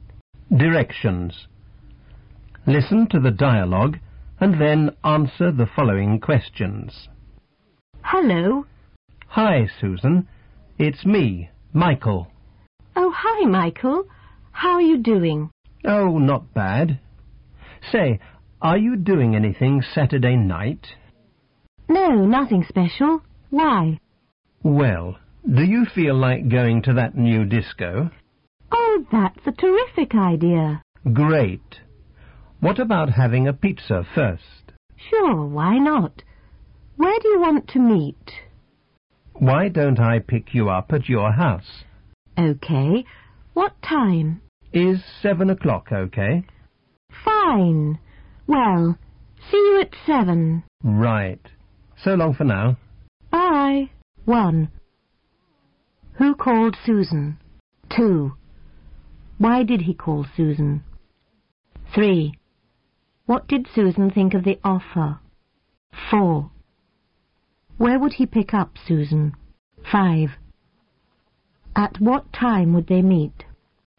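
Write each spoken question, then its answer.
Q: Who called Susan?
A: Michael

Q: Why did he call Susan?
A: To ask her to go to the new disco on Saturday night

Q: What did Susan think of the offer?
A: She thought it was a terrific idea

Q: Where would he pick up Susan?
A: At her house

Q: At what time would they meet?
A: At 7 o'clock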